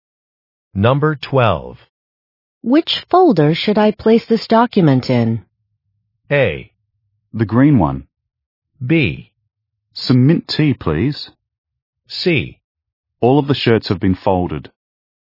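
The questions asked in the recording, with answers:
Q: Which folder should I place this document in?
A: A: The green one.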